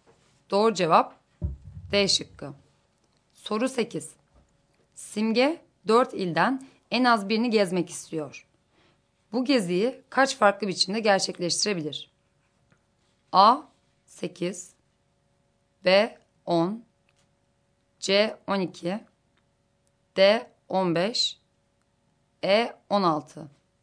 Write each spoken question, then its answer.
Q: Bu geziyi kaç farklı biçimde gerçekleştirebilir?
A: Doğru cevap D şıkkı.